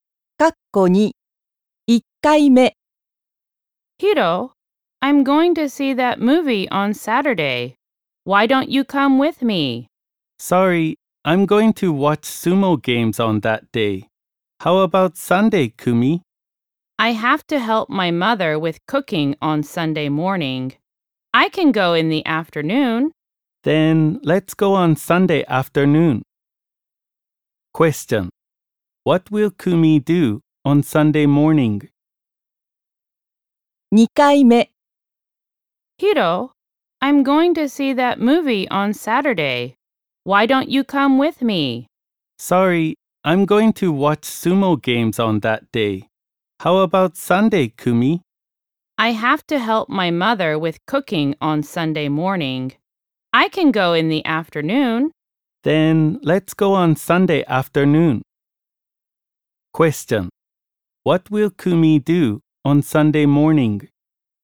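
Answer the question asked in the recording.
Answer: Help her mother with cooking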